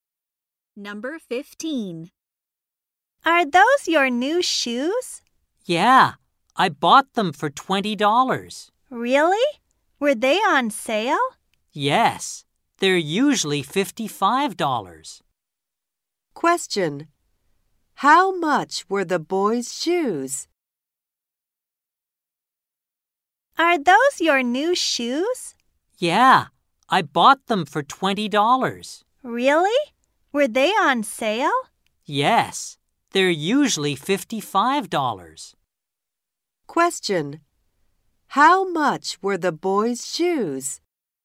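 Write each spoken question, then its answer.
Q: Question. How much were the boys' shoes?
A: $20.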